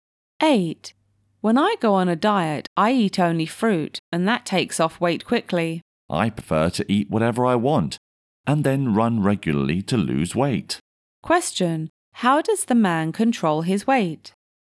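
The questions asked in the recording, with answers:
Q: How does the man control his weight?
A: He eats whatever he wants and runs regularly.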